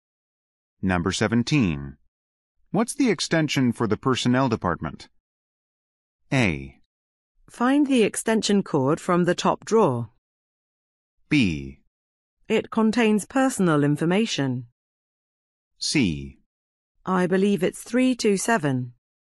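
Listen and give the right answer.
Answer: C: I believe it's 327.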